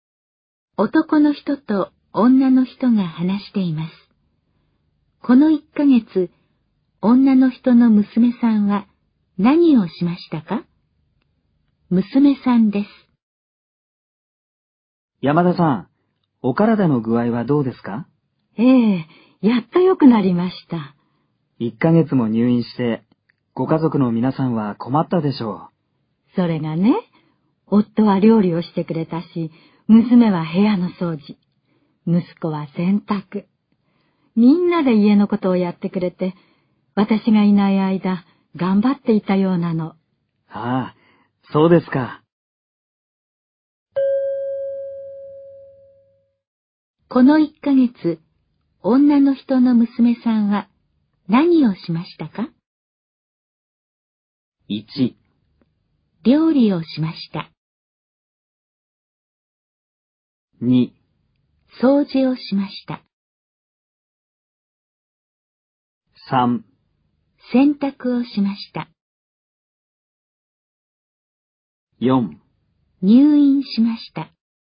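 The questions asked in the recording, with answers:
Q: この1ヶ月、女の人の娘さんは何をしましたか?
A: 2: 掃除をしました。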